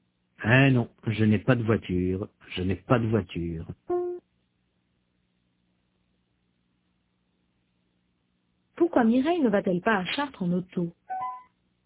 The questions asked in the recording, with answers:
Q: Pourquoi Mireille ne va-t-elle pas à Chartres en auto?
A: Parce qu'elle n'a pas de voiture.